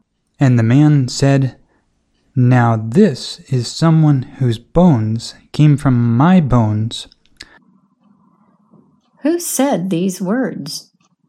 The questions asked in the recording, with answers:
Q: Who said these words?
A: The man said these words.